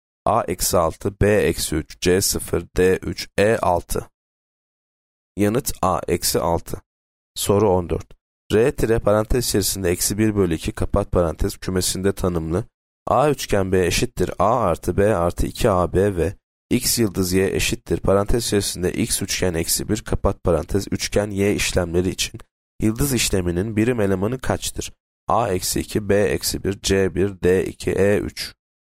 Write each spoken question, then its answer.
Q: A üçgen B eşittir A artı B artı 2AB ve X yıldız Y eşittir parantez içerisinde X üçgen eksi 1 kapat parantez üçgen Y işlemleri için yıldız işleminin birim elemanı kaçtır?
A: Yanıt B eksi 1.